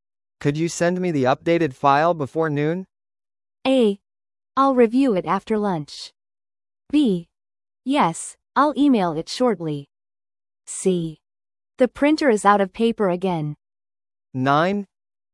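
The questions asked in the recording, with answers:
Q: Could you send me the updated file before noon?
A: B: Yes, I'll email it shortly.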